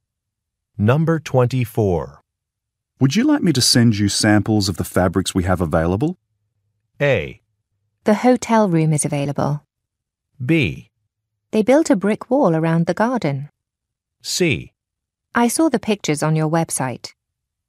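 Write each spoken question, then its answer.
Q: Would you like me to send you samples of the fabrics we have available?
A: C: I saw the pictures on your website.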